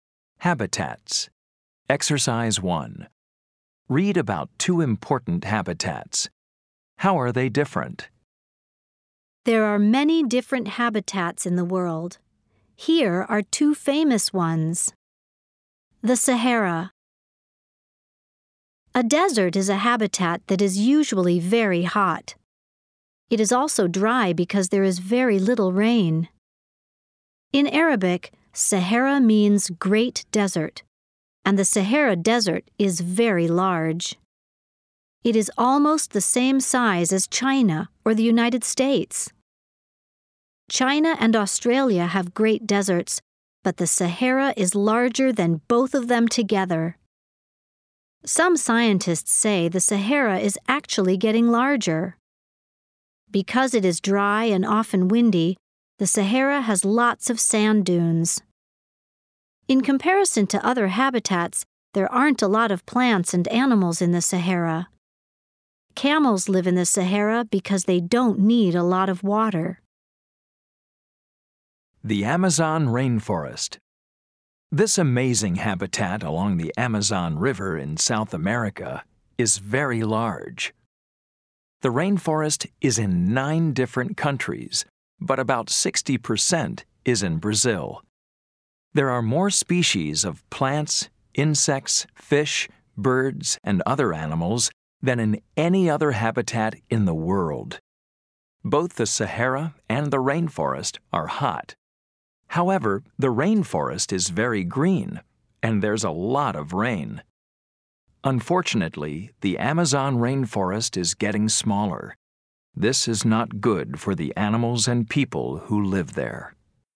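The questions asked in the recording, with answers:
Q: How are they different?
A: The Sahara is a dry desert with little rain and few plants and animals, and it is getting larger; the Amazon rainforest is green with lots of rain and more species than any other habitat, and it is getting smaller.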